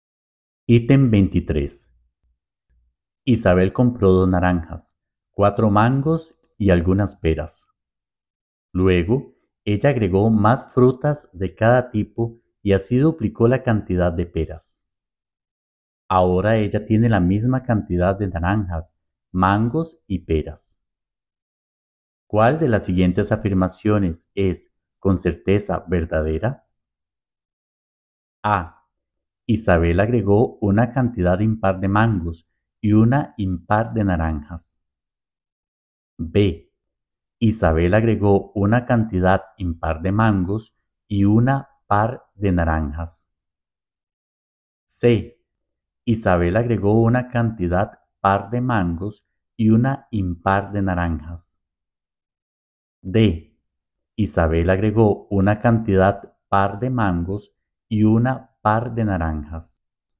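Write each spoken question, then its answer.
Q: ¿Cuál de las siguientes afirmaciones es, con certeza, verdadera?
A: D: Isabel agregó una cantidad par de mangos y una par de naranjas.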